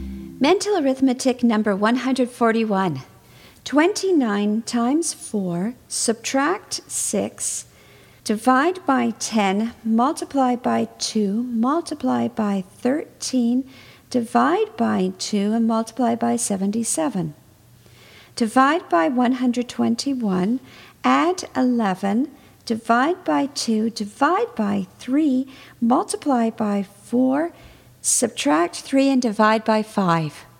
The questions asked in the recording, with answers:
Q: 29 times 4, subtract 6, divide by 10, multiply by 2, multiply by 13, divide by 2, and multiply by 77. Divide by 121, add 11, divide by 2, divide by 3, multiply by 4, subtract 3, and divide by 5.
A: And the answer is 13.